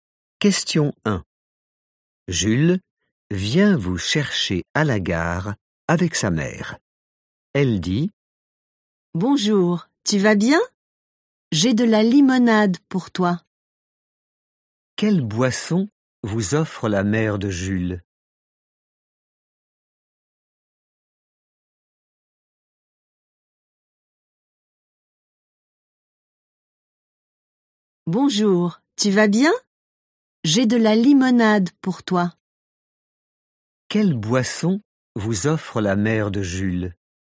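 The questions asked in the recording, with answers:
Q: Quelle boisson vous offre la mère de Jules?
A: de la limonade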